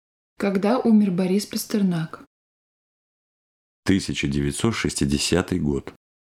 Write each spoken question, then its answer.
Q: Когда умер Борис Пастернак?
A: Борис Пастернак умер в 1960 году.